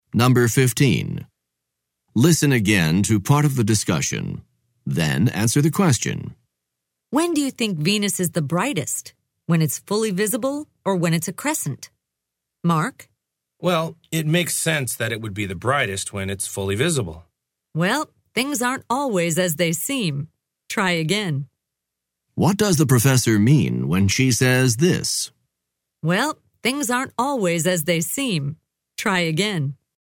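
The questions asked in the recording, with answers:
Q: What does the professor mean when she says this?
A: Mark's answer is wrong; Venus is not brightest when fully visible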